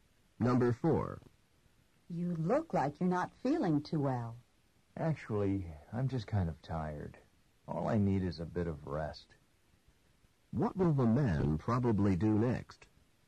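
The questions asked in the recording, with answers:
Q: What will the man probably do next?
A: Rest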